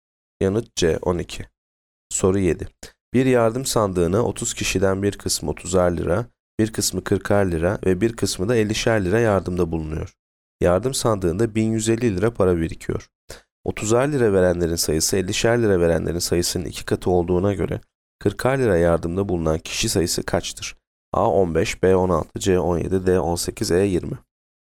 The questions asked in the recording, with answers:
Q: 30'ar lira verenlerin sayısı 50'şer lira verenlerin sayısının 2 katı olduğuna göre 40'ar lira yardımda bulunan kişi sayısı kaçtır?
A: Yanıt A 15.